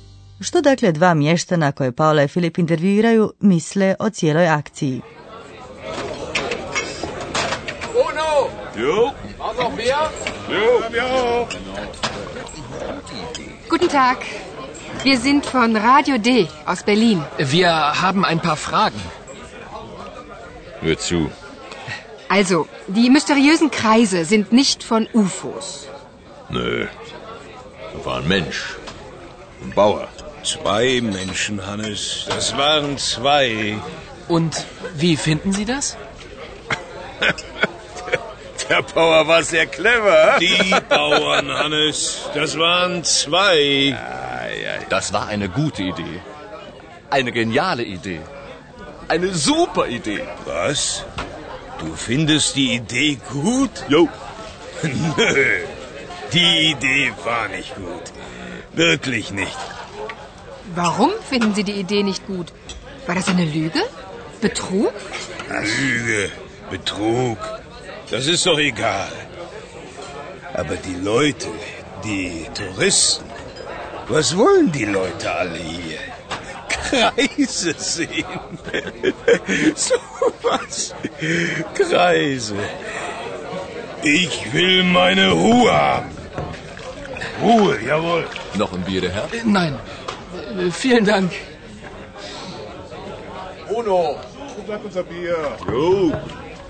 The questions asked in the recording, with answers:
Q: Što dakle dva mještana koje Paula i Filip intervjuiraju misle o cijeloj akciji?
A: Kao što ste sigurno uspjeli čuti, dva mještana imaju različita mišljenja.